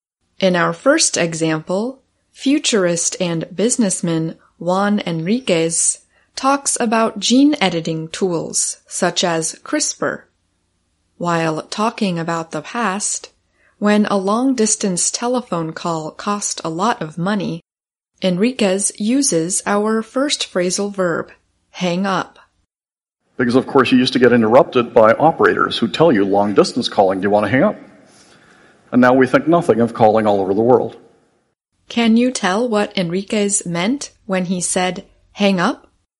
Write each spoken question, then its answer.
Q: Can you tell what Enriquez meant when he said hang up?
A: to end or finish a phone call